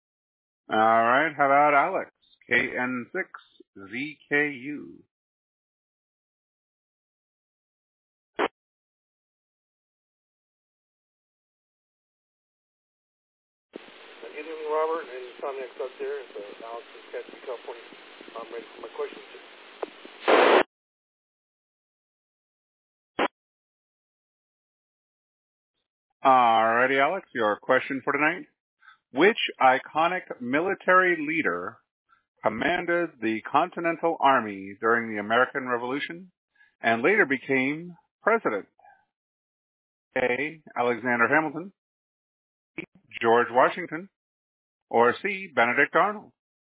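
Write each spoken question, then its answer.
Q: Which iconic military leader commanded the Continental Army during the American Revolution and later became president?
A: B: George Washington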